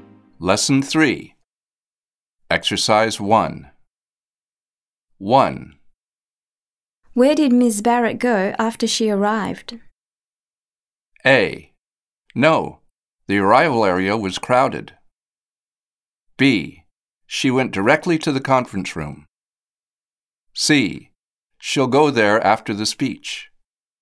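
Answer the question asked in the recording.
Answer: B: She went directly to the conference room.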